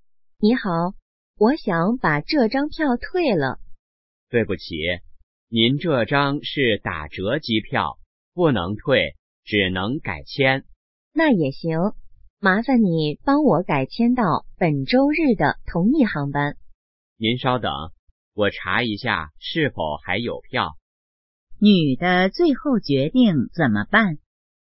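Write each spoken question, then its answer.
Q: 女的最后决定怎么办?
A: 改签到本周日的同一航班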